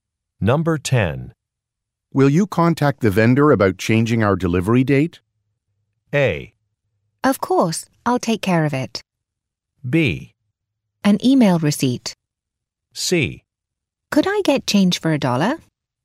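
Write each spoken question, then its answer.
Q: Will you contact the vendor about changing our delivery date?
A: A: Of course, I'll take care of it.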